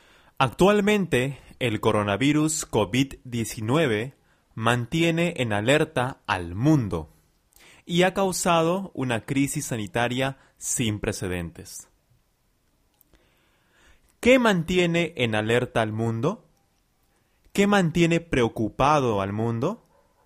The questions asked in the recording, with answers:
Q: ¿Qué mantiene en alerta al mundo?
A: El coronavirus COVID-19 el COVID-19 mantiene en alerta al mundo entero.